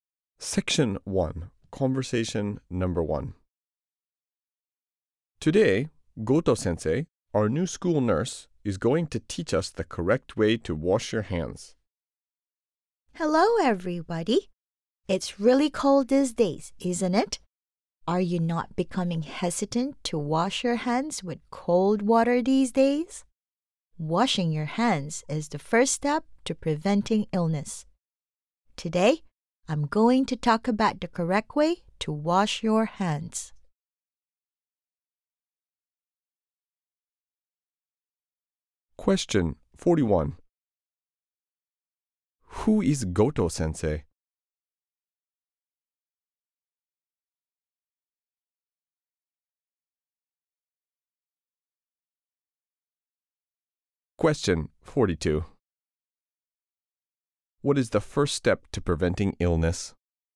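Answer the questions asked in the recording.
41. The new school nurse
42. Washing your hands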